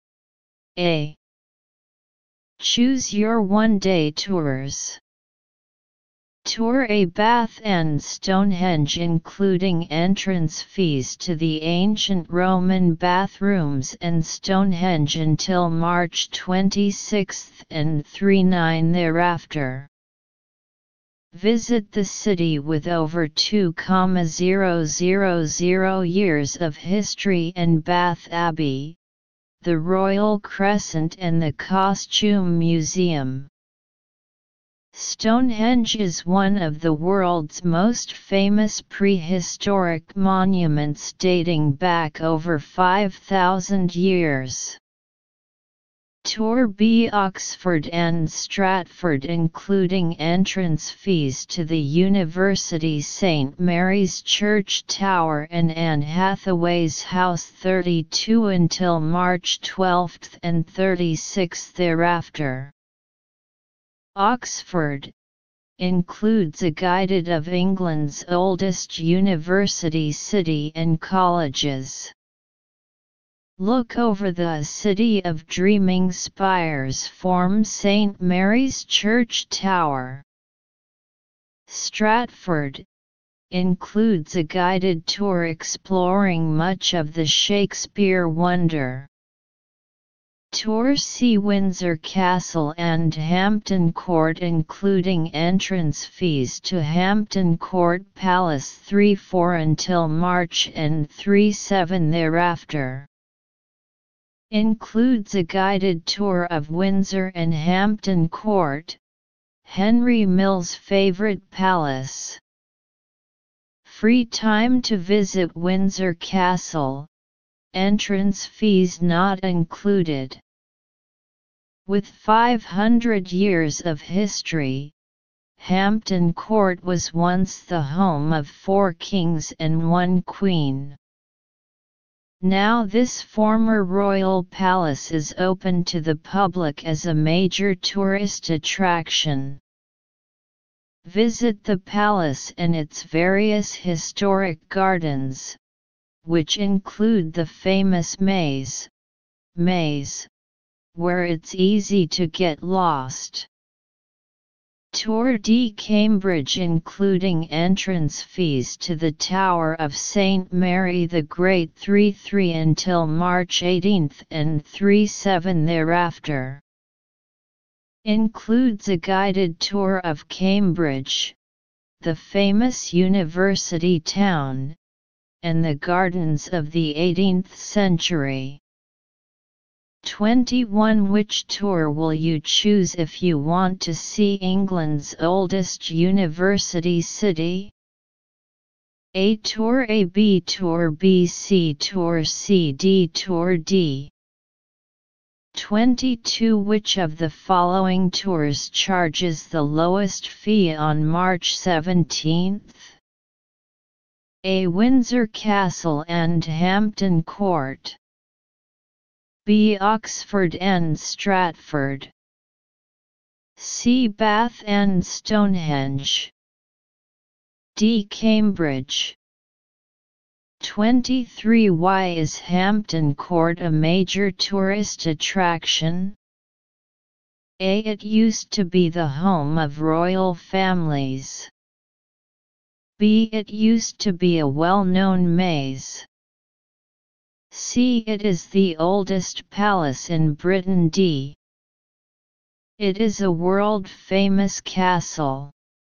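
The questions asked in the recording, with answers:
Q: Which tour will you choose if you want to see England's oldest university city?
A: B: Tour B.

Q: Why is Hampton Court a major tourist attraction?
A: A: It used to be the home of royal families.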